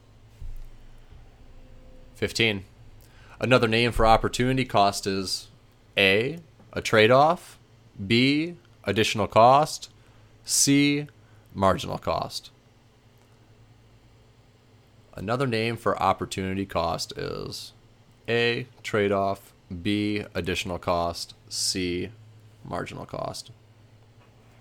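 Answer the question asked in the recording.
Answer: A: a trade-off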